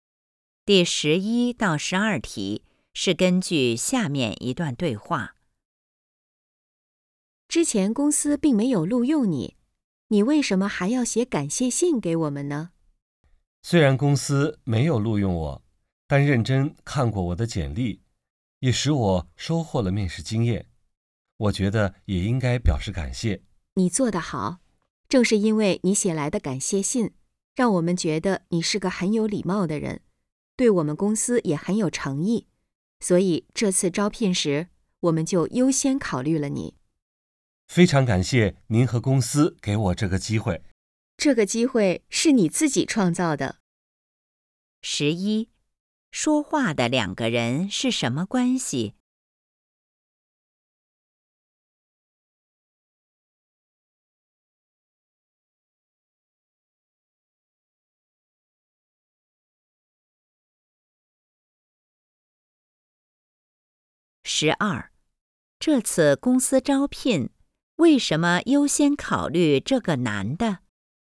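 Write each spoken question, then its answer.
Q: 说话的两个人是什么关系?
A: 招聘方(公司面试官)和应聘者

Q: 这次公司招聘,为什么优先考虑这个男的?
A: 因为他写了感谢信,显得有礼貌、有诚意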